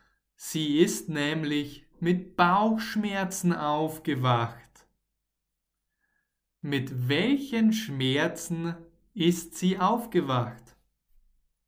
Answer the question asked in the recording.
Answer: Richtig, mit Bauchschmerzen.